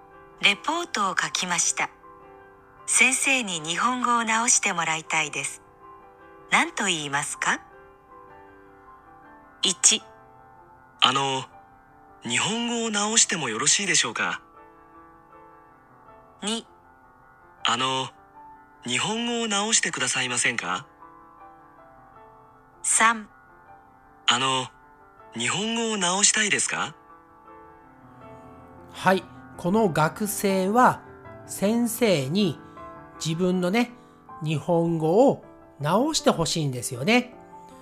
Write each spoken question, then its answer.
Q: 何と言いますか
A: 答えは2番です。